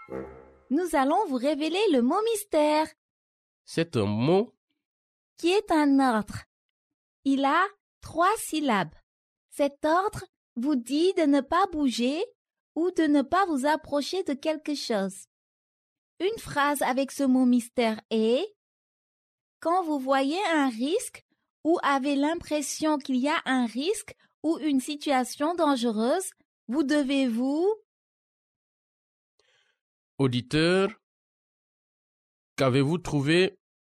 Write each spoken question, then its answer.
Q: Auditeur, qu'avez-vous trouvé?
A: Le mot mystère est éloigné.